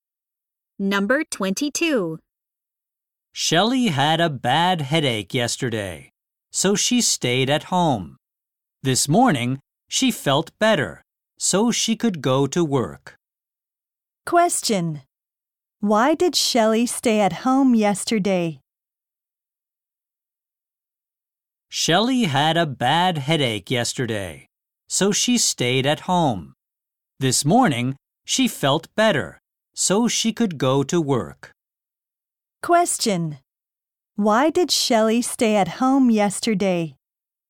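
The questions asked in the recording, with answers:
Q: Why did Shelley stay at home yesterday?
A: She had a bad headache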